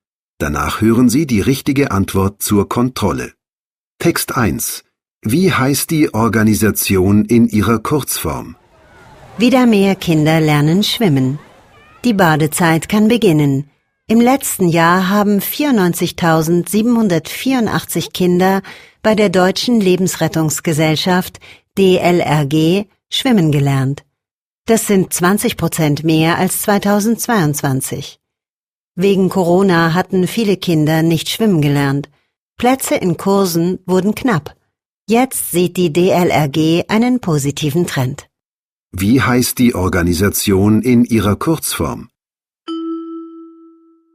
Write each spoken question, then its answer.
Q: Wie heißt die Organisation in ihrer Kurzform?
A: Die Deutsche Lebensrettungsgesellschaft heißt kurz DLRG.